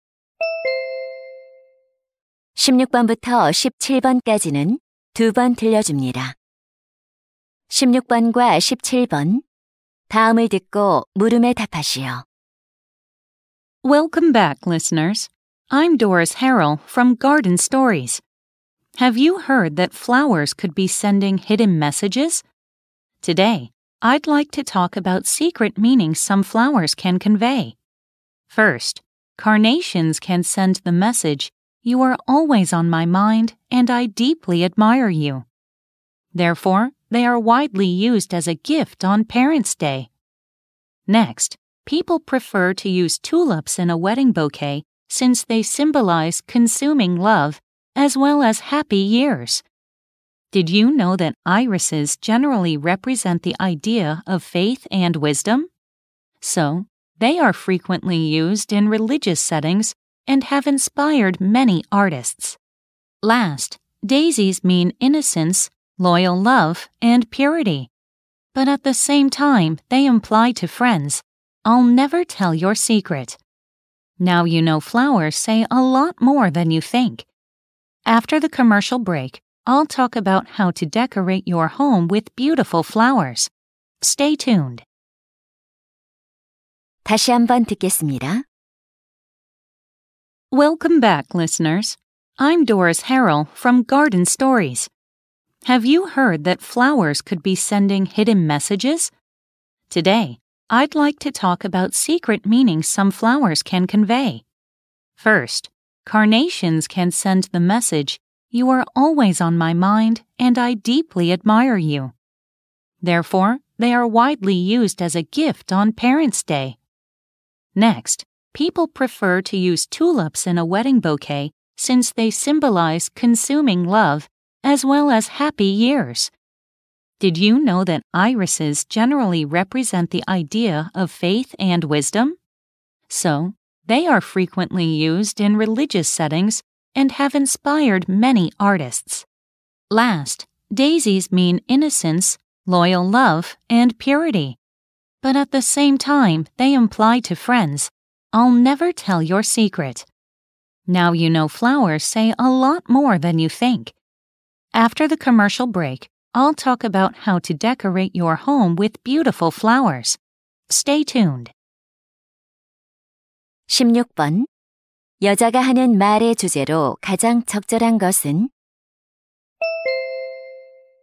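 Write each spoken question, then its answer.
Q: 여자가 하는 말의 주제로 가장 적절한 것은?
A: 꽃이 전하는 숨은 의미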